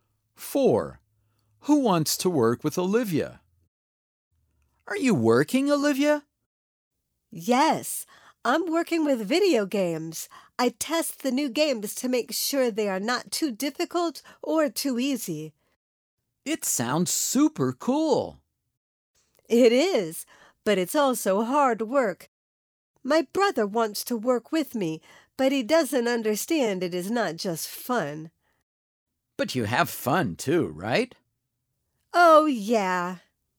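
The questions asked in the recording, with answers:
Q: Who wants to work with Olivia?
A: Her brother.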